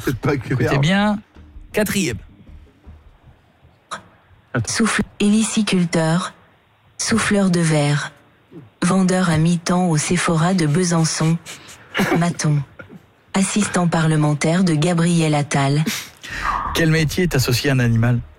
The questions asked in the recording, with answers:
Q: Quel métier est associé à un animal?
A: Hélicicultur.